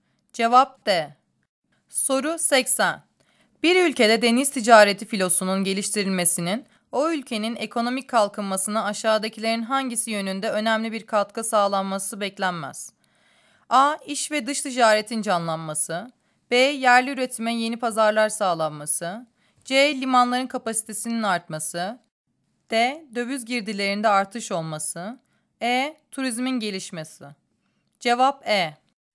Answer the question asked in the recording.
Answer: Cevap E.